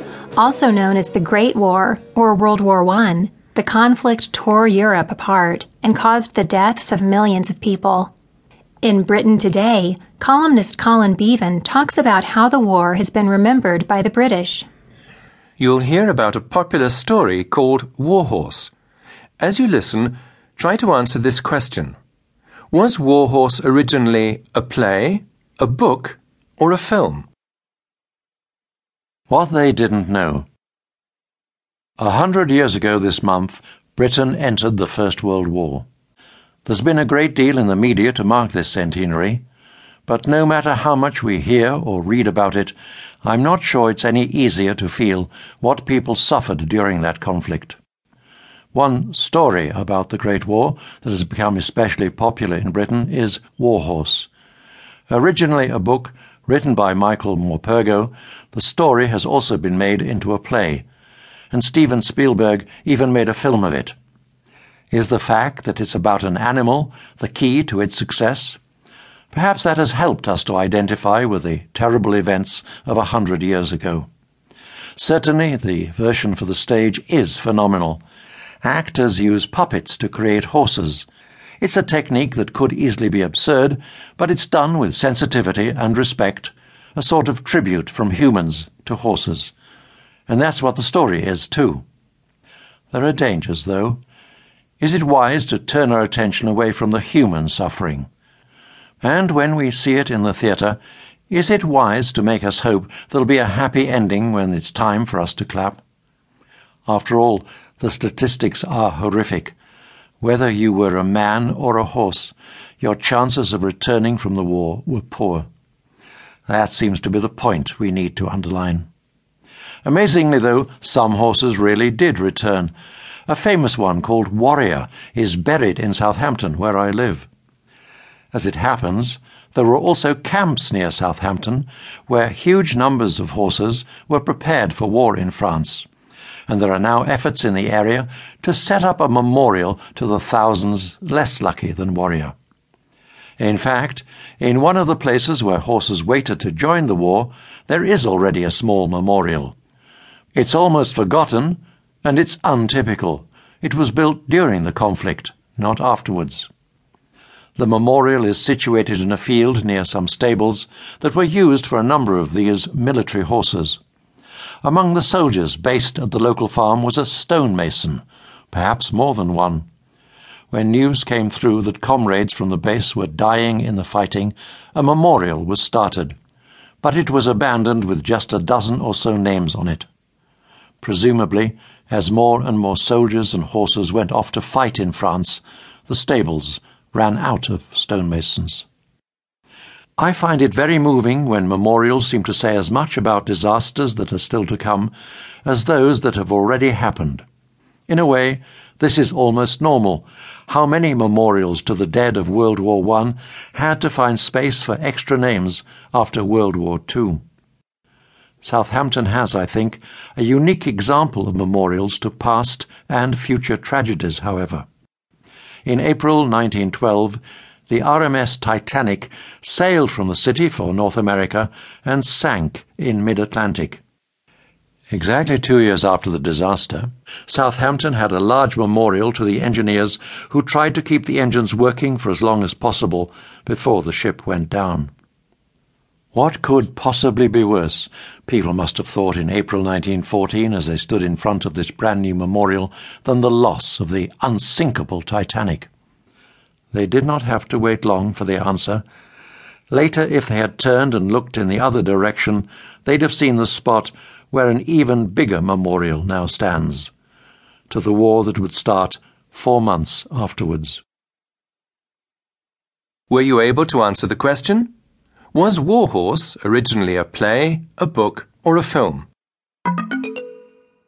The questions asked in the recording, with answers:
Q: Was Warhorse originally a play, a book, or a film?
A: It was originally a book.